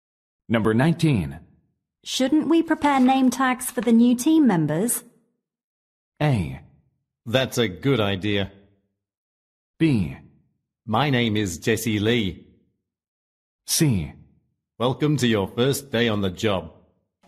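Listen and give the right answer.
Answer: A: That's a good idea.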